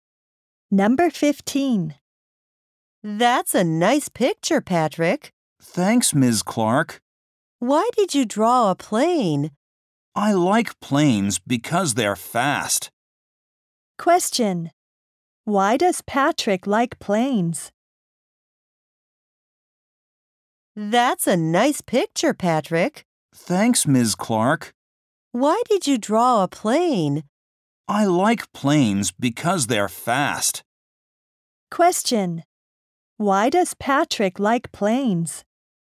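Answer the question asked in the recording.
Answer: Because they're fast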